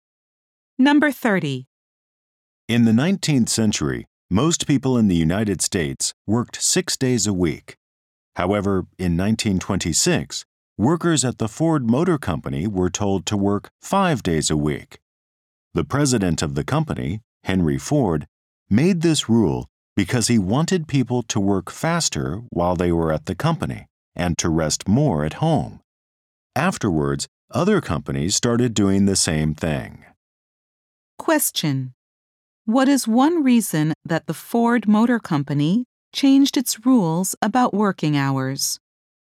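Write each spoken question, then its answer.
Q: What is one reason that the Ford Motor Company changed its rules about working hours?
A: Henry Ford wanted people to work faster at work and rest more at home.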